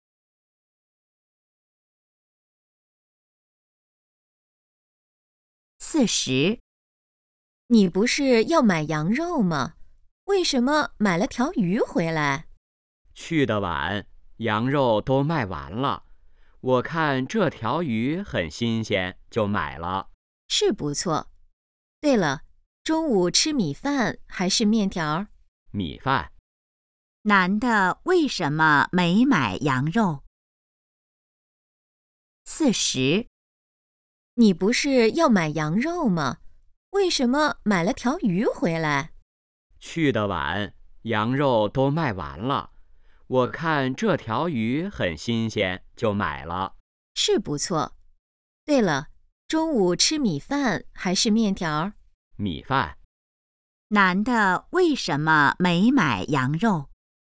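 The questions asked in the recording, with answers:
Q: 男的为什么没买羊肉?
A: 羊肉卖完了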